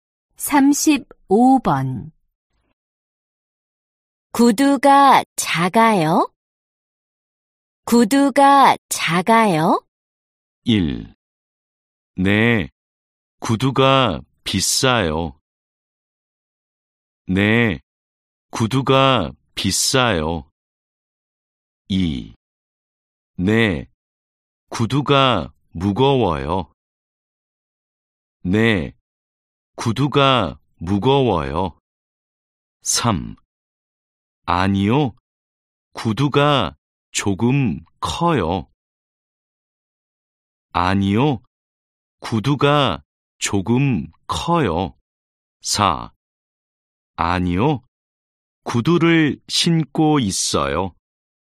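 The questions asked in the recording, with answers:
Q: 구두가 작아요?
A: 3: 아니요, 구두가 조금 커요.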